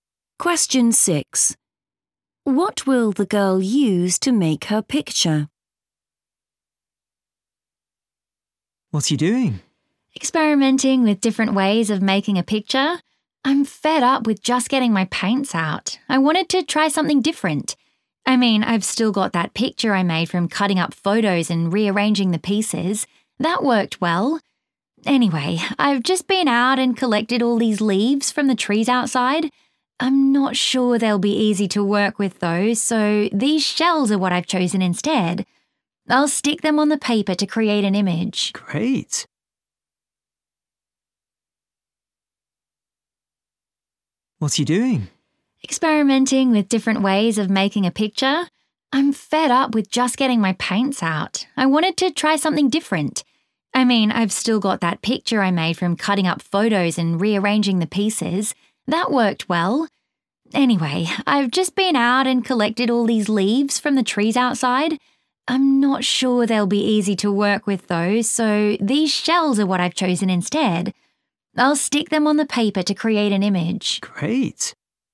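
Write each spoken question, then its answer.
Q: What will the girl use to make her picture?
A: shells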